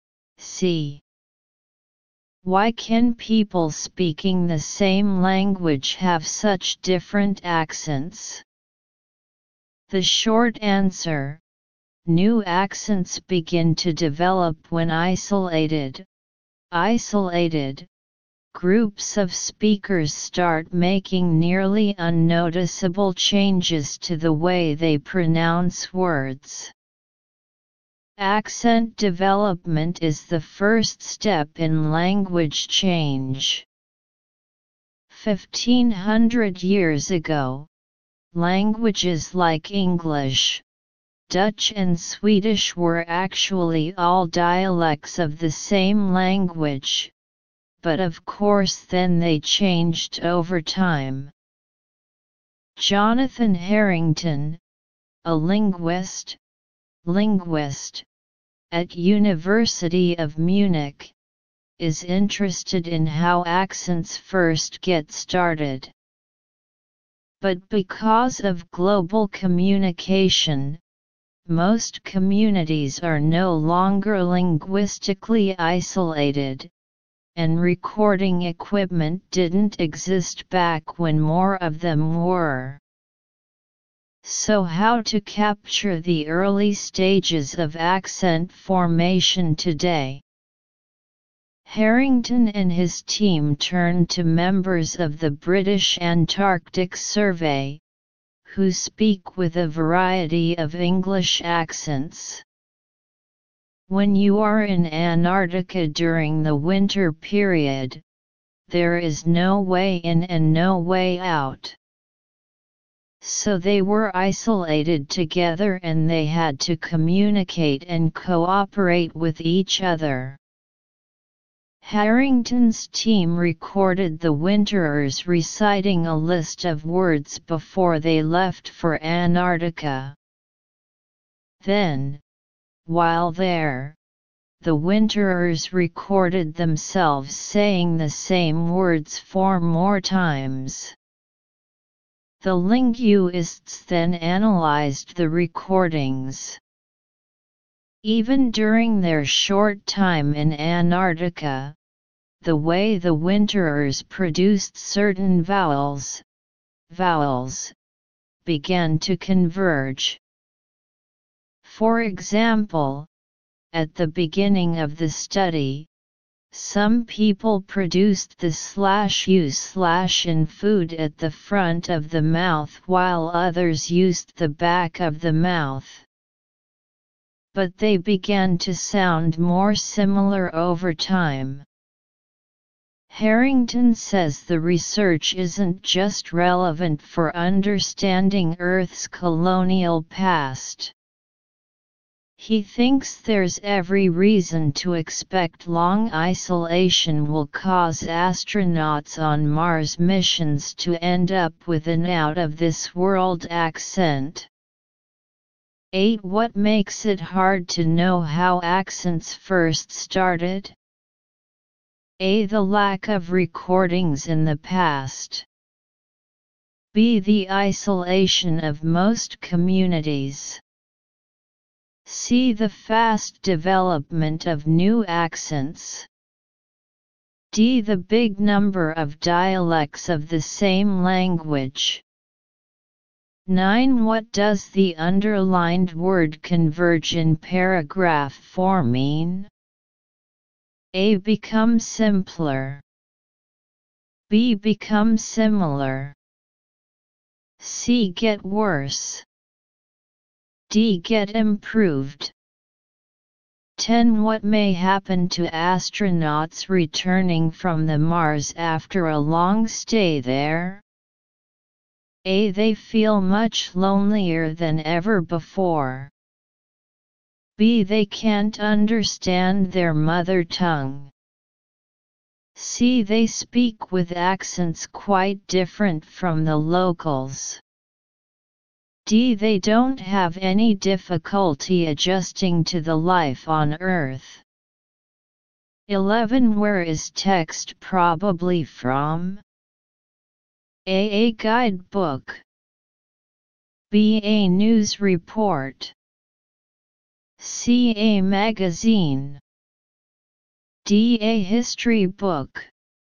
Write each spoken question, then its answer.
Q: What makes it hard to know how accents first started?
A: 8. A.

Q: What does the underlined word converge in paragraph 4 mean?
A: 9. B.

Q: What may happen to astronauts returning from the Mars after a long stay there?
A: 10. C.